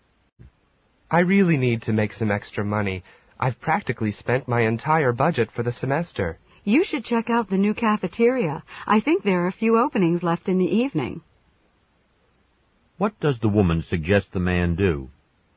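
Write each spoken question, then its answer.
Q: What does the woman suggest the man do?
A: Look for an evening job at the new cafeteria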